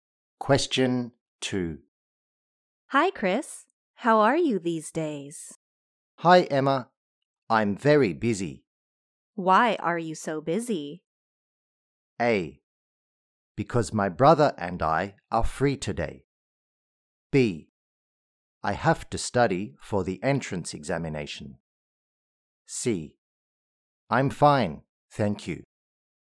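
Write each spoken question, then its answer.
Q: Why are you so busy?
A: B: I have to study for the entrance examination.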